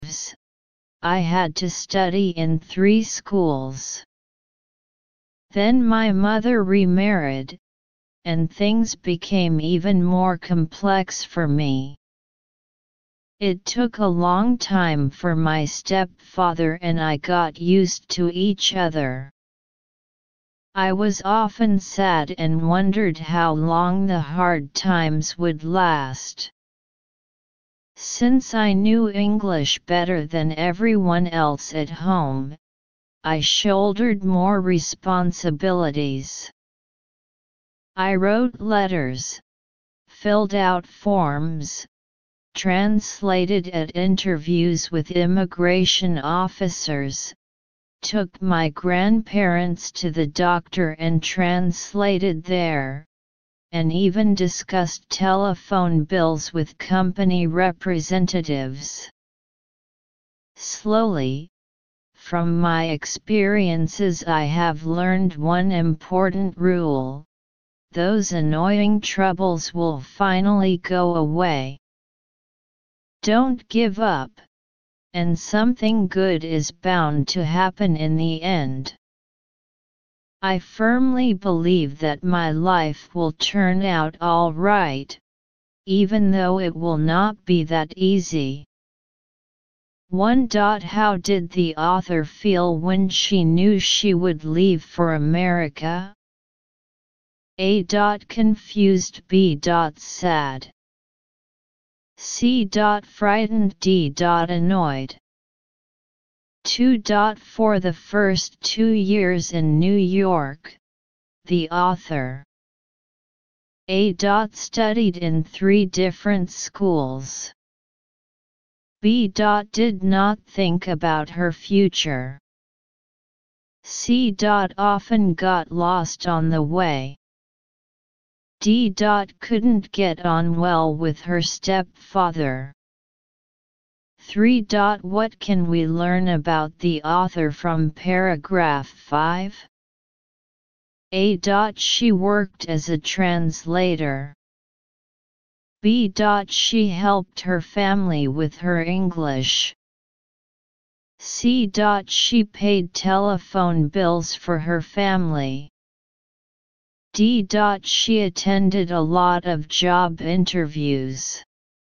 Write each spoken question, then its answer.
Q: For the first 2 years in New York, the author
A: 2. A.

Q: What can we learn about the author from paragraph 5?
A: 3. B.